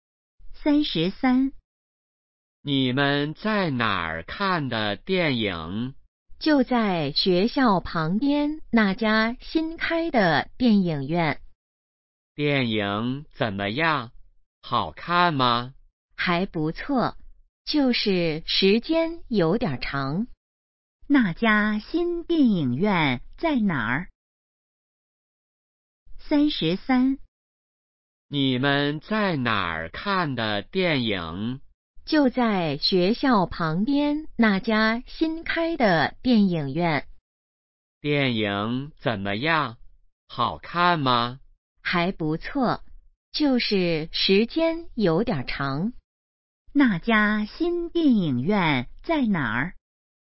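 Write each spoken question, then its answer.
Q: 那家新电影院在哪儿?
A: 学校旁边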